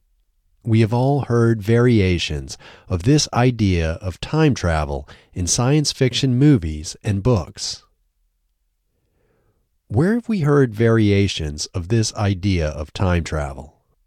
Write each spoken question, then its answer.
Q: Where have we heard variations of this idea of time travel?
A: We have all heard variations of this idea of time travel in science fiction movies and books.